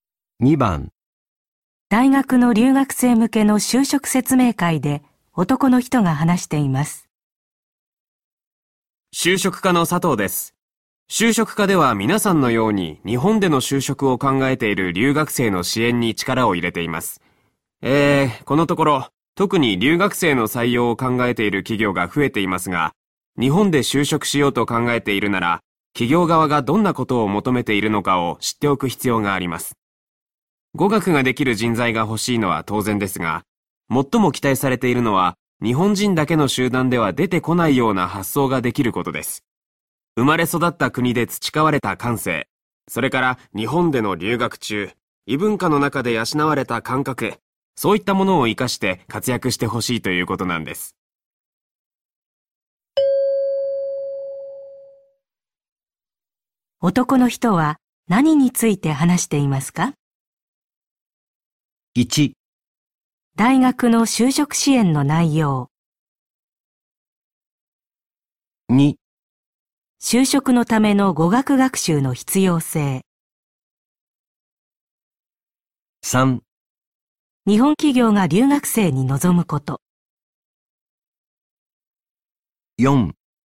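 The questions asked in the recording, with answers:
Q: 男の人は何について話していますか?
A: 3: 日本企業が留学生に望むこと。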